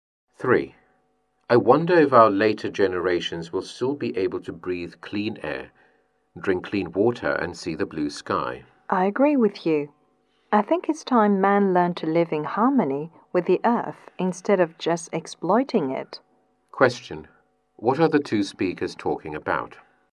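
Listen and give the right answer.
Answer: Protecting the environment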